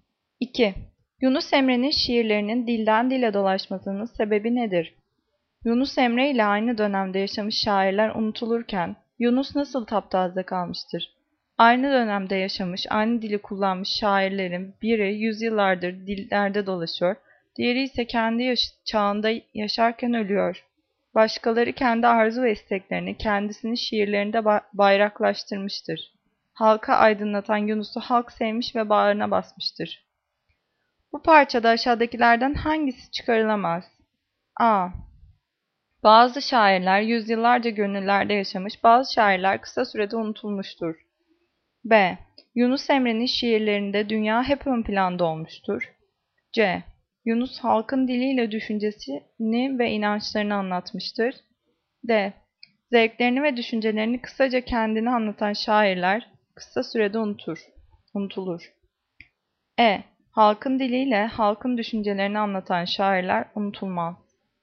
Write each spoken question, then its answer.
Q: Bu parçada aşağıdakilerden hangisi çıkarılamaz?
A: Cevap B. Yunus Emre'nin şiirlerinde dünya hep ön planda olmuştur.